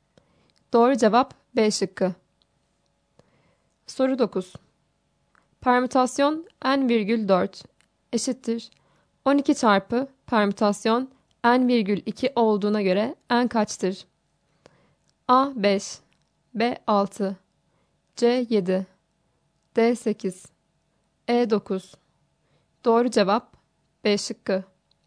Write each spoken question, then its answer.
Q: Permütasyon N virgül 4 eşittir 12 çarpı permütasyon N virgül 2 olduğuna göre N kaçtır?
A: Doğru cevap B şıkkı.